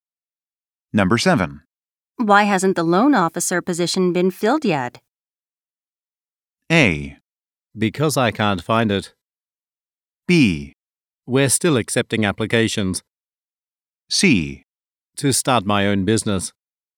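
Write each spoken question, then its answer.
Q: Why hasn't the loan officer position been filled yet?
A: B: We're still accepting applications.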